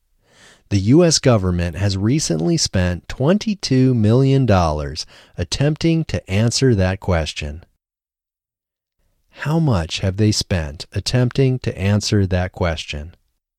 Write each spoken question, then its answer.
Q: How much have they spent attempting to answer that question?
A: They have spent $22 million attempting to answer that question.